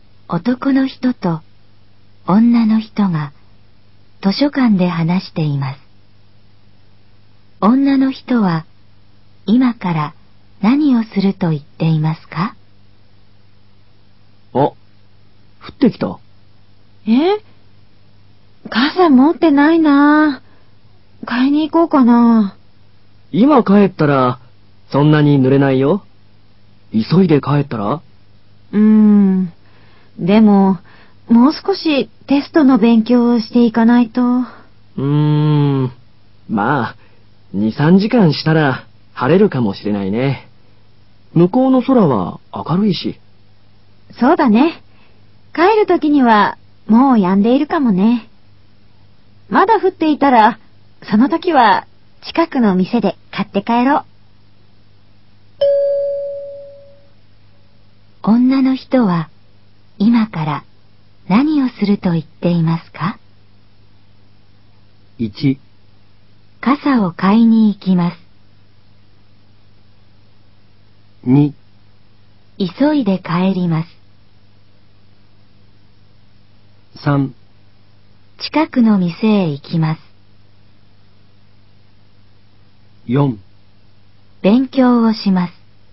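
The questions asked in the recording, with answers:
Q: 女の人は今から何をすると言っていますか?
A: 4: 勉強をします。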